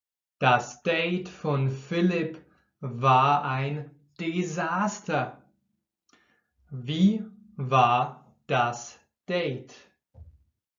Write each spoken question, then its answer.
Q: Wie war das Date?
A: Ein Desaster. Es war ein Desaster.